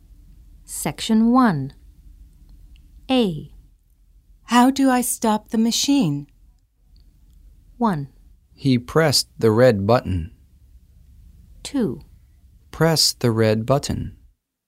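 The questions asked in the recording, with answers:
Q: How do I stop the machine?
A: 2: Press the red button.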